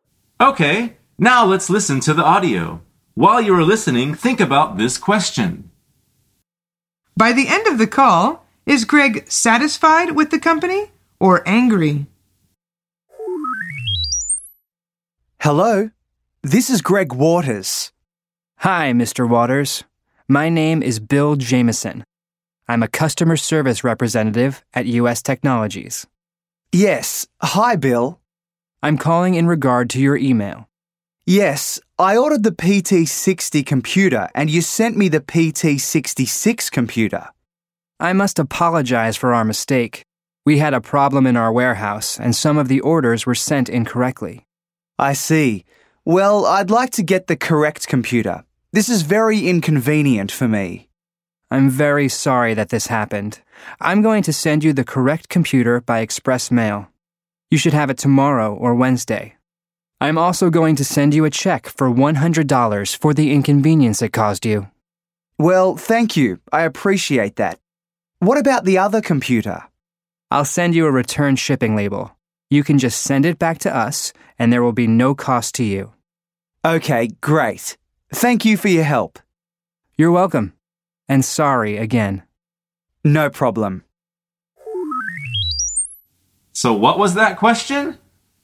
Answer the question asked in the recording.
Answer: The answer is he is satisfied.